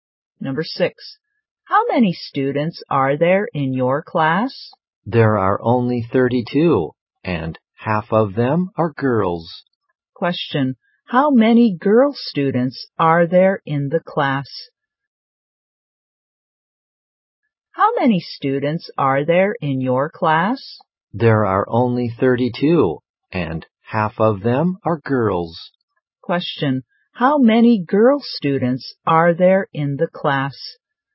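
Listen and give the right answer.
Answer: 16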